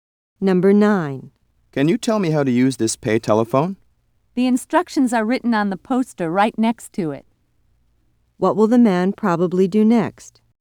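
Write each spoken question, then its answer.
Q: What will the man probably do next?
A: Read the instructions on the poster next to the phone.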